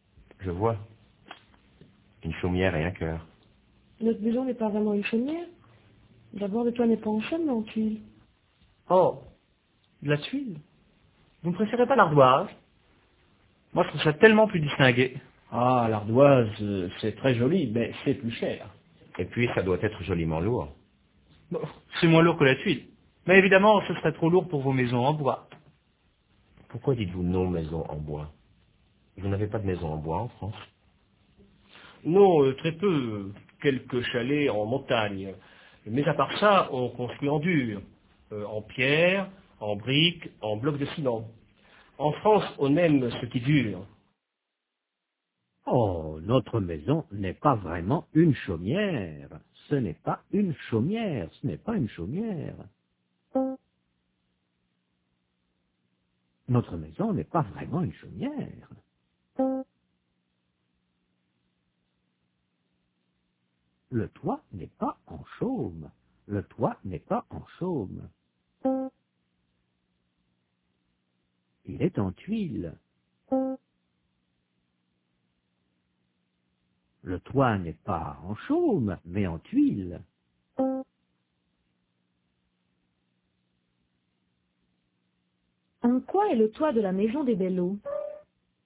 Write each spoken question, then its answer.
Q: En quoi est le toit de la maison des Belleau?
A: En tuiles.